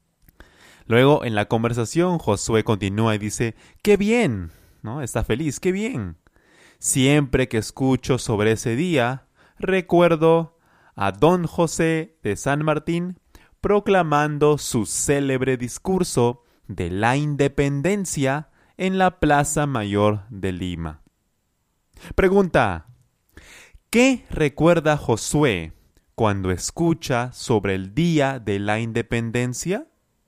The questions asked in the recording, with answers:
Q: ¿Qué recuerda Josué cuando escucha sobre el Día de la Independencia?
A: Él recuerda a José de San Martín proclamando su célebre discurso.